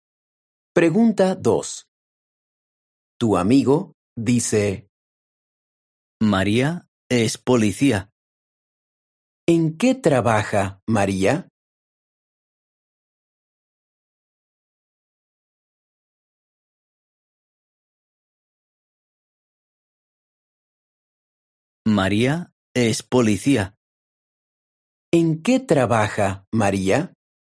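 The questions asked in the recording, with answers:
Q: ¿En qué trabaja María?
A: es policía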